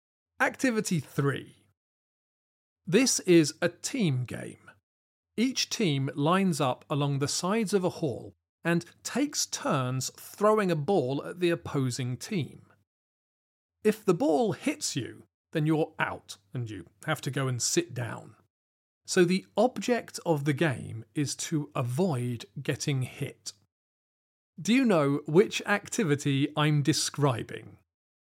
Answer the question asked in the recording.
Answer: The answer is dodgeball.